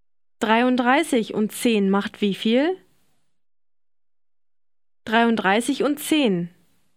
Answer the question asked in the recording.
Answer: 43.